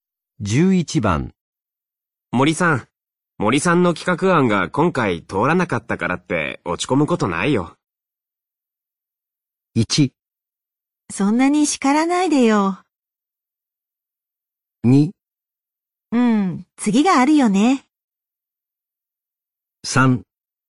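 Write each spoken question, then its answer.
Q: 森さん、森さんの企画案が今回通らなかったからって落ち込むことないよ。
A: 2: うん、次があるよね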